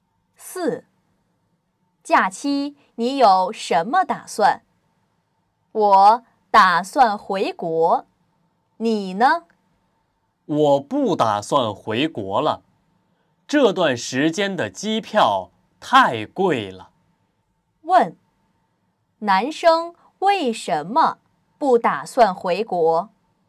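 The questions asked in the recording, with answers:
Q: 问,男生为什么不打算回国?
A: 这段时间的机票太贵了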